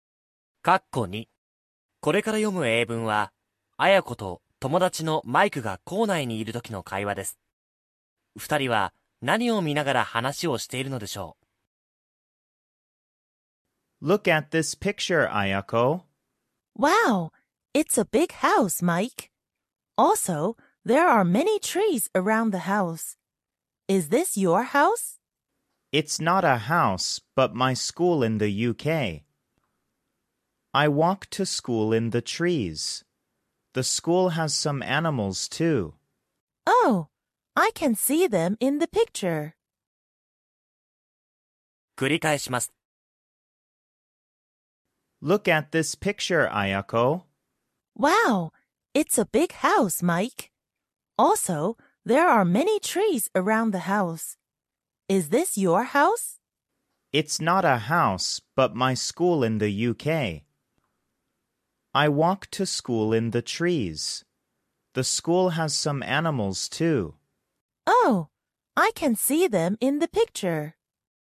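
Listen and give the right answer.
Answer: イギリスにあるマイクの学校の写真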